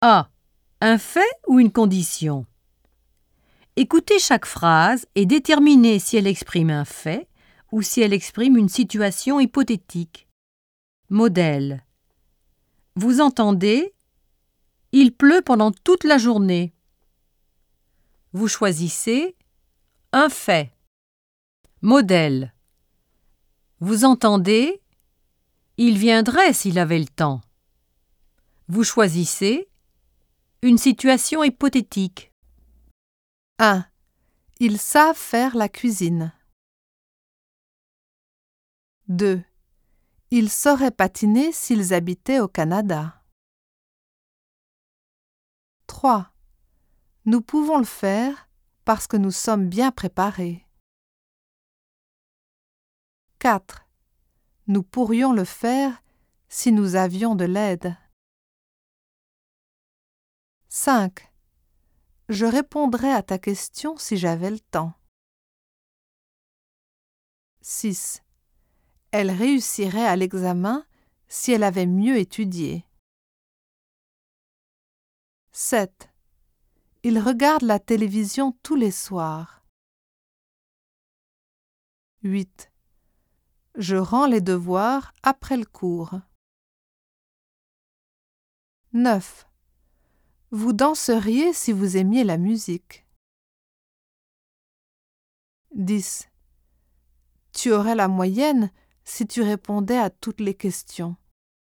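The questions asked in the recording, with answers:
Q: Ils savent faire la cuisine.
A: Un fait

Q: Ils sauraient patiner s'ils habitaient au Canada.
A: Une situation hypothétique

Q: Nous pouvons le faire parce que nous sommes bien préparés.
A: Un fait

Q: Nous pourrions le faire si nous avions de l'aide.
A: Une situation hypothétique

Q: Elle réussirait à l'examen si elle avait mieux étudié.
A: Une situation hypothétique

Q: Il regarde la télévision tous les soirs.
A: Un fait

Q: Je rends les devoirs après le cours.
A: Un fait

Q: Vous danseriez si vous aimiez la musique.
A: Une situation hypothétique

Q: Tu aurais la moyenne si tu répondais à toutes les questions.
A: Une situation hypothétique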